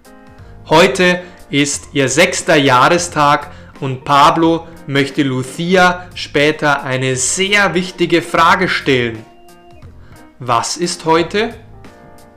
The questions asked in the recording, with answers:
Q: Was ist heute?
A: Heute ist ihr sechster Jahrestag.